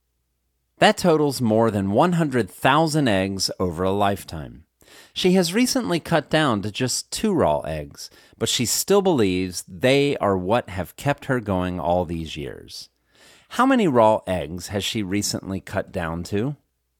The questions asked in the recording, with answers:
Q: How many raw eggs has she recently cut down to?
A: She has recently cut down to just 2 raw eggs.